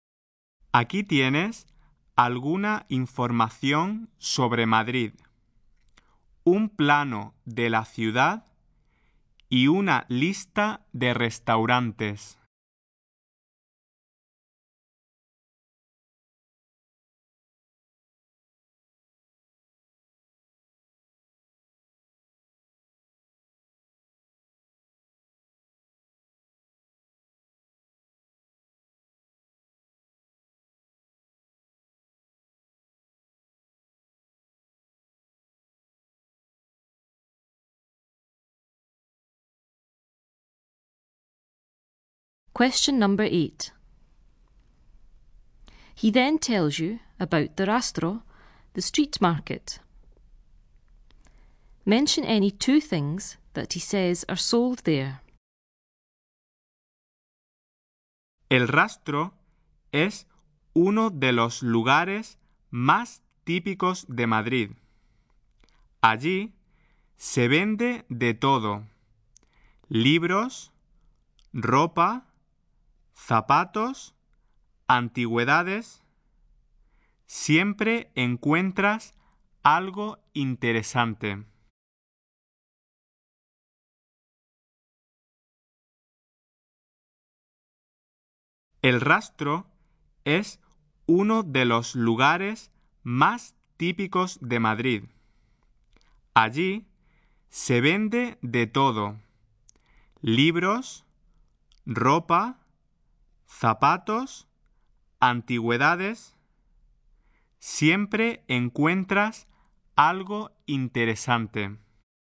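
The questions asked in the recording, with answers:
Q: Mention any two things that he says are sold there.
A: Any two of: books, clothes, shoes, antiques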